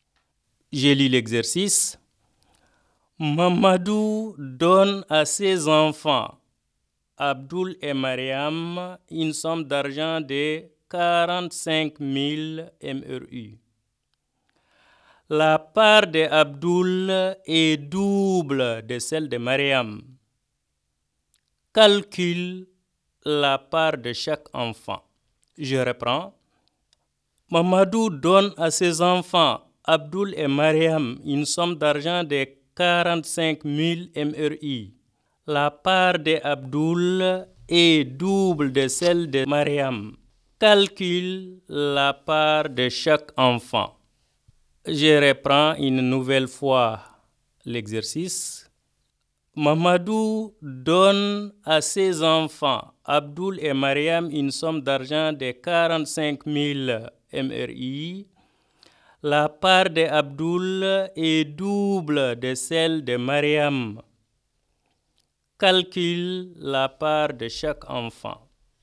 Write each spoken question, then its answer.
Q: Calcule la part de chaque enfant.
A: Eh bien, Abdul aura 30 000 MRI et Mariam a déjà 15 000 ougia.